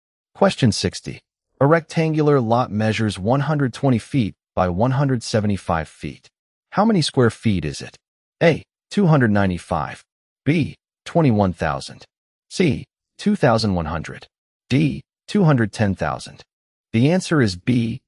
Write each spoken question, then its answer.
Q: How many square feet is it?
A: The answer is B.